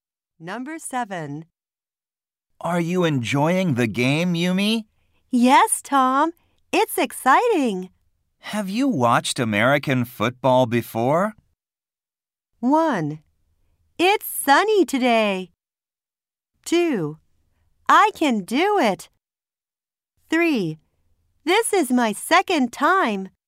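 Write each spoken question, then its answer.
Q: Have you watched American football before?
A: 3: This is my second time.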